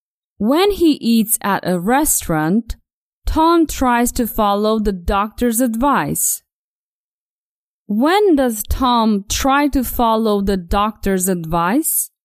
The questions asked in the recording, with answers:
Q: When does Tom try to follow the doctor's advice?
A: Yes. Tom tries to follow the doctor's advice when he eats at a restaurant.